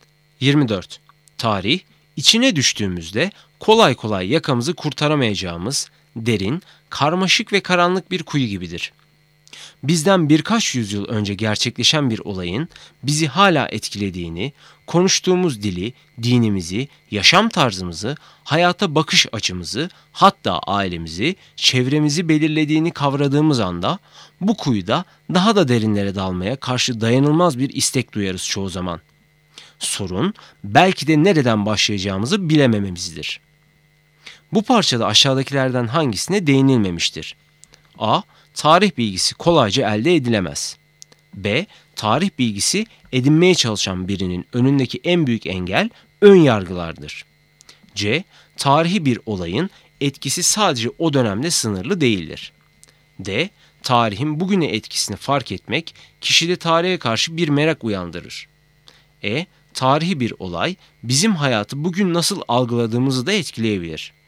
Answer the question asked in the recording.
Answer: Doğru cevap B. Tarih bilgisi edinmeye çalışan birinin önündeki en büyük engel ön yargılardır.